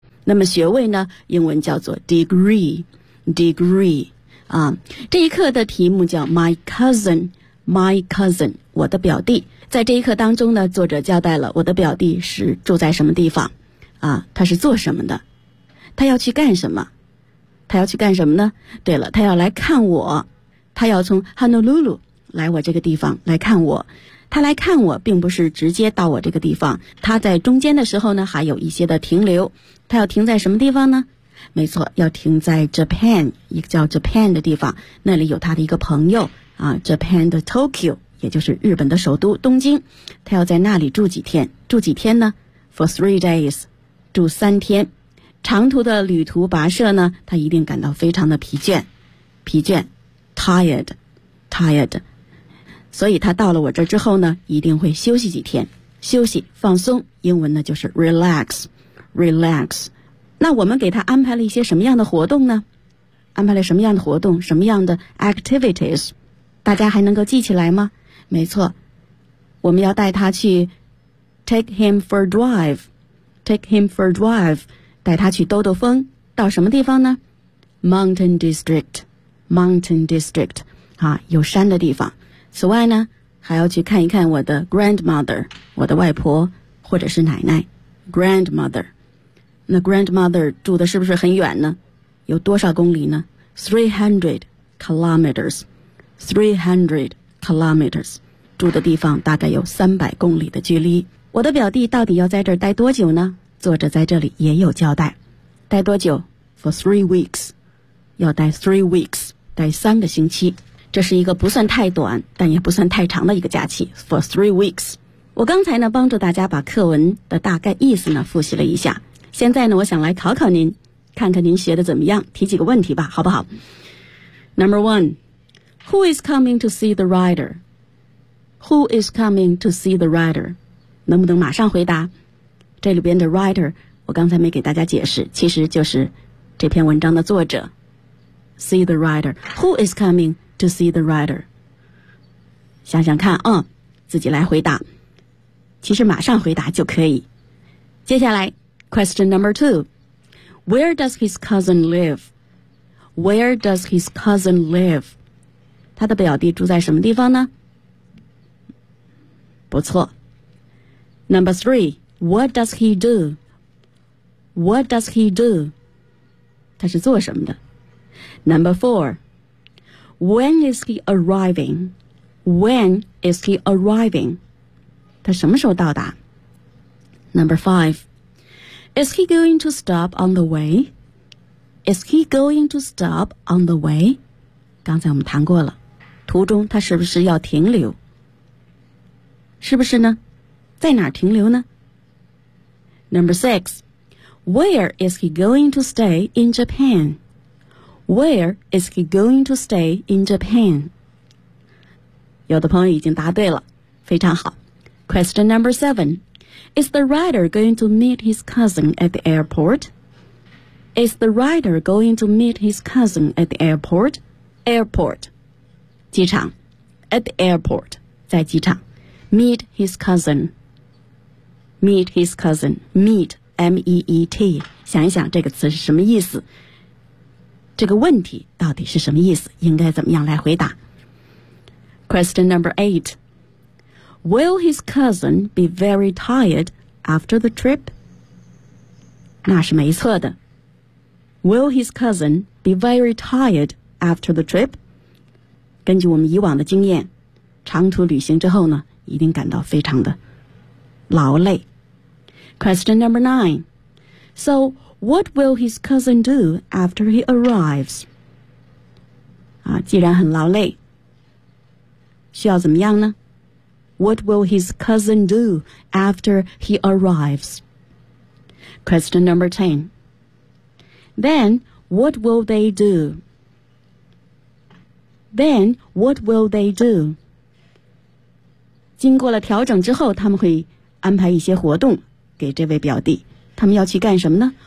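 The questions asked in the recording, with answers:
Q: Who is coming to see the writer?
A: His cousin

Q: Where does his cousin live?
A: In Honolulu

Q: Is he going to stop on the way?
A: Yes, in Japan (Tokyo)

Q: where is he going to stay in Japan?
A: In Tokyo, with a friend, for 3 days

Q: Will his cousin be very tired after the trip?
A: Yes, he will

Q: So, what will his cousin do after he arrives?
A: He will rest and relax for a few days

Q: Then, what will they do?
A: Take him for a drive to the mountain district and visit grandmother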